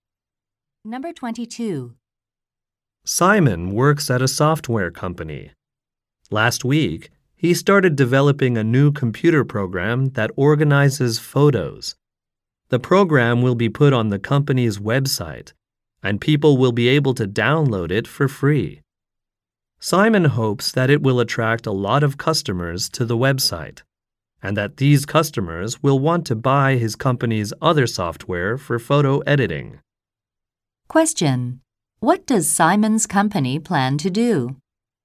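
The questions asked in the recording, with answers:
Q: What does Simon's company plan to do?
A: Offer a free photo-organizing program on its website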